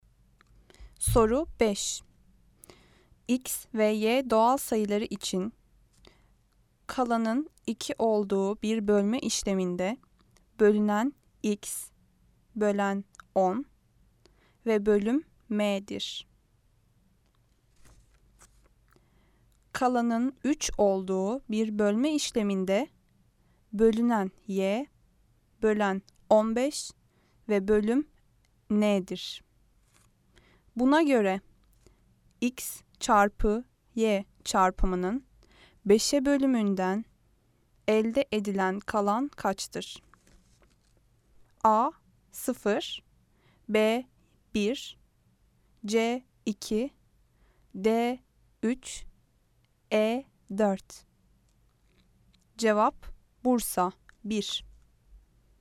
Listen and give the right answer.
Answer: Cevap Bursa 1.